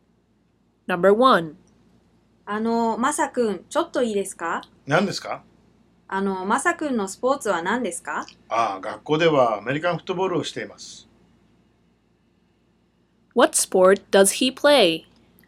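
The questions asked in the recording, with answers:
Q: What sport does he play?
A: American football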